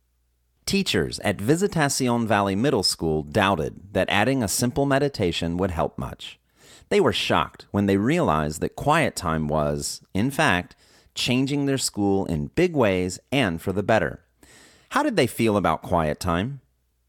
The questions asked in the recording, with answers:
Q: How did they feel about quiet time?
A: They were shocked that quiet time was changing their school for the better.